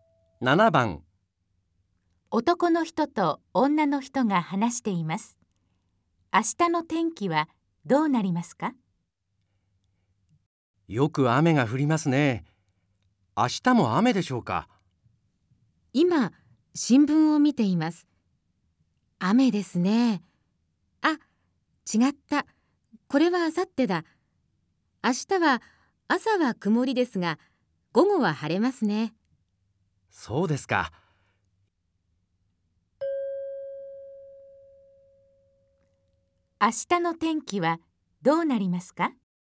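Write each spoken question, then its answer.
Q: 明日の天気はどうなりますか?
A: 朝は曇り、午後は晴れ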